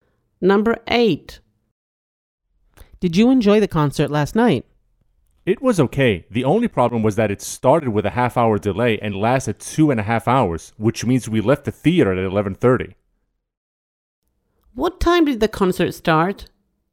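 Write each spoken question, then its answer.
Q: What time did the concert start?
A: 9:00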